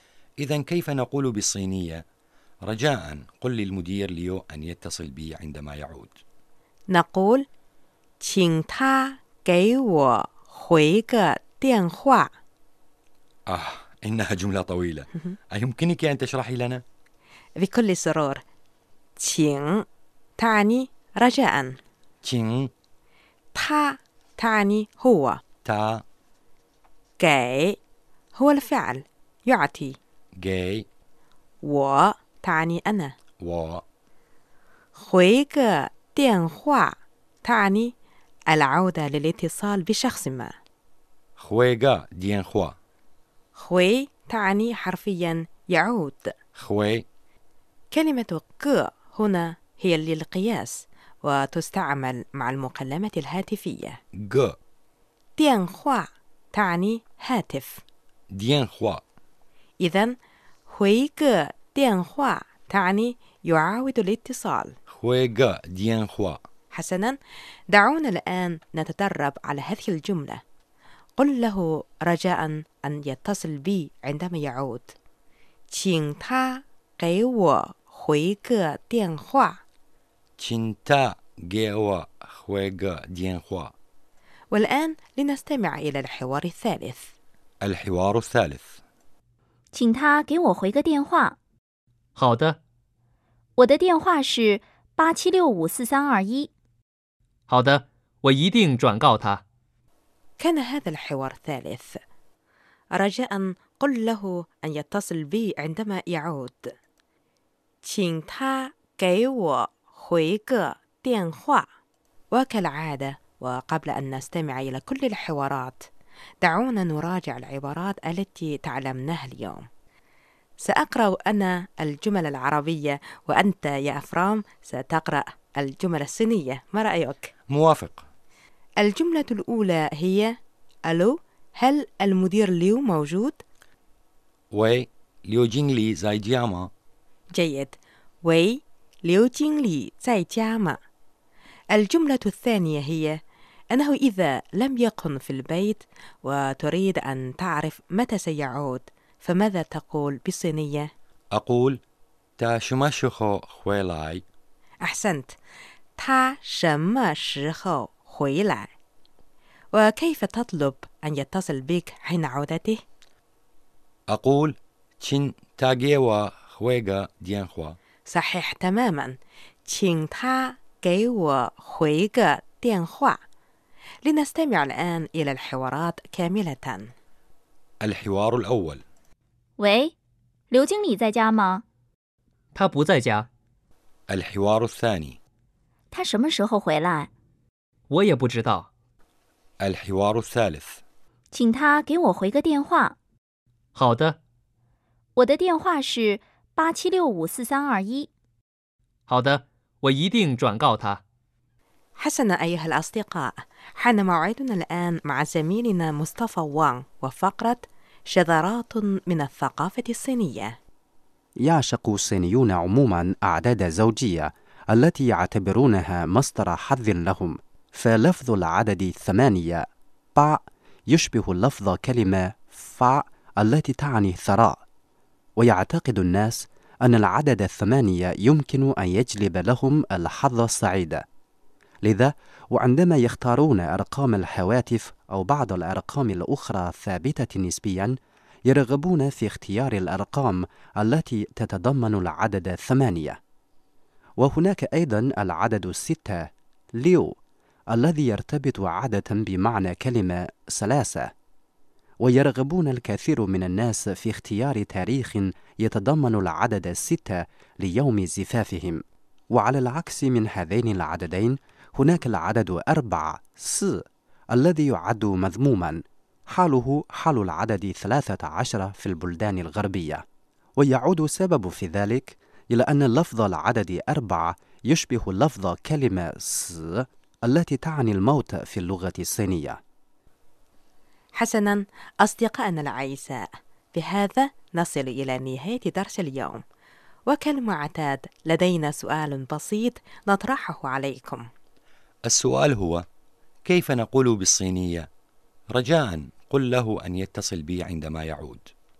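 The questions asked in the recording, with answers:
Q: السؤال هو كيف نقول بالصينية؟ رجاء قل له أن يتصل بي عندما يعود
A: 请他给我回个电话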